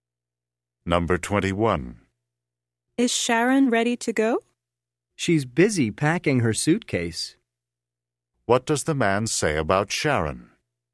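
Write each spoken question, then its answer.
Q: What does the man say about Sharon?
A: She is busy packing her suitcase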